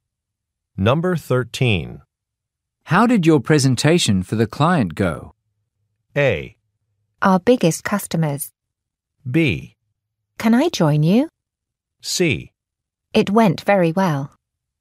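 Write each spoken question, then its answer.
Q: How did your presentation for the client go?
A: C: It went very well.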